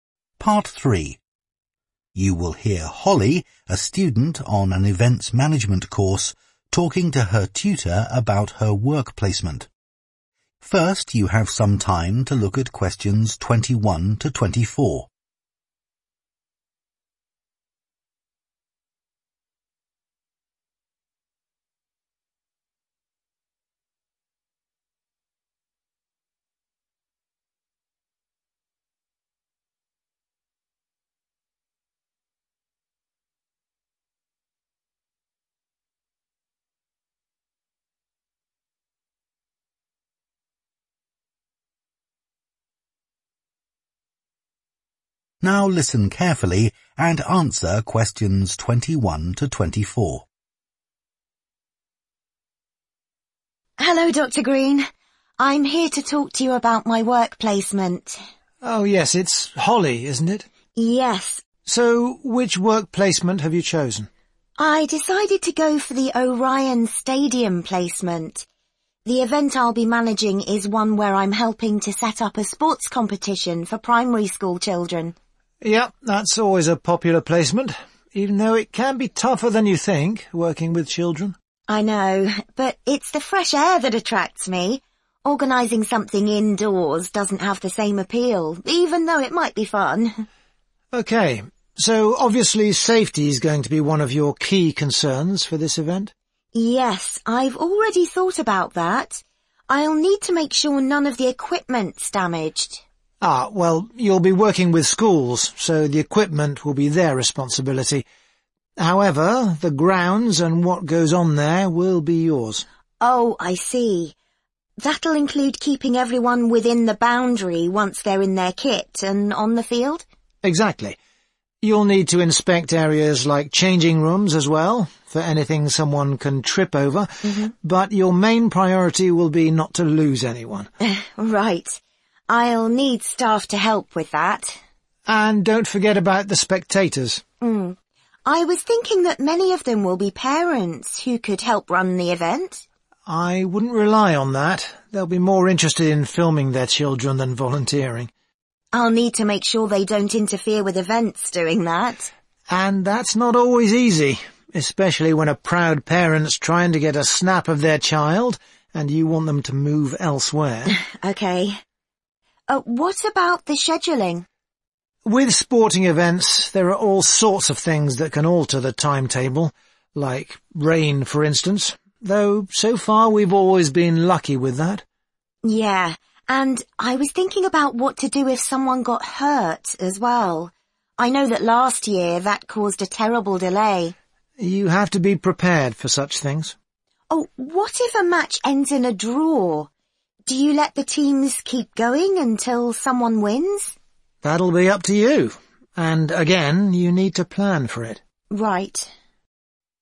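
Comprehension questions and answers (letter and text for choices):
Choose the correct letter, A, B or C.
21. Holly has chosen the Orion Stadium placement because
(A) it involves children.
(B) it is outdoors.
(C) it sounds like fun.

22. Which aspect of safety does Dr Green emphasise most?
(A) ensuring children stay in the stadium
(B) checking the equipment children will use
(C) removing obstacles in changing rooms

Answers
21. (B) it is outdoors.
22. (A) ensuring children stay in the stadium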